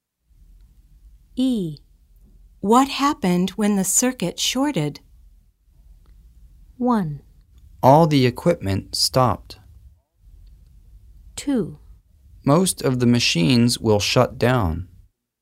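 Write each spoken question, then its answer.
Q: What happened when the circuit shorted?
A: 1: All the equipment stopped.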